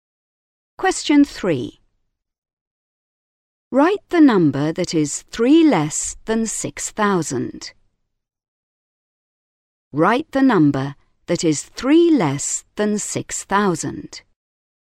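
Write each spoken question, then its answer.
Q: Write the number that is 3 less than 6,000.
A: 5997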